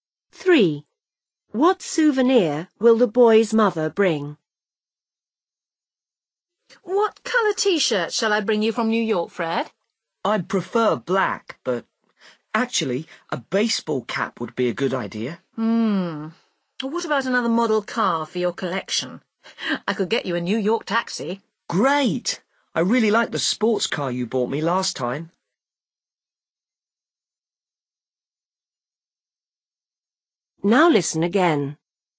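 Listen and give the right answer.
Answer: a model New York taxi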